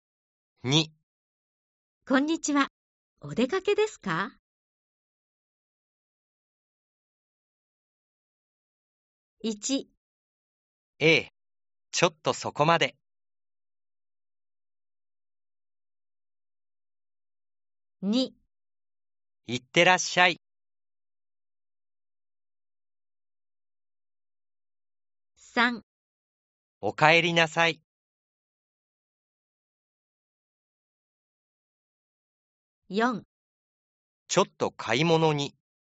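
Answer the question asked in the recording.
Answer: 1: ええ、ちょっとそこまで。 / 4: ちょっと買い物に。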